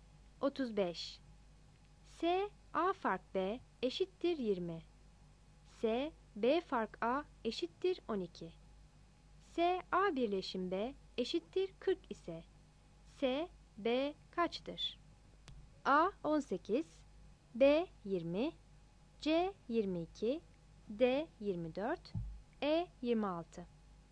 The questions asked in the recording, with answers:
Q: S A birleşim B eşittir 40 ise S B kaçtır?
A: 35 B